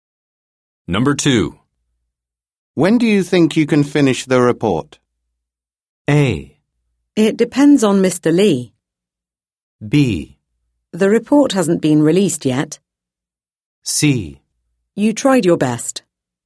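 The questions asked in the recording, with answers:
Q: When do you think you can finish the report?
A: A: It depends on Mr. Lee.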